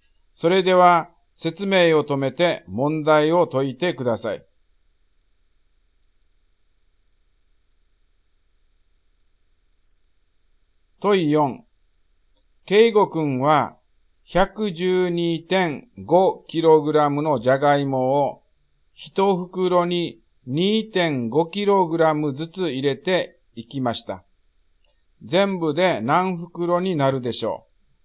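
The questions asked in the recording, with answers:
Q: 全部で何袋になるでしょう?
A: 45袋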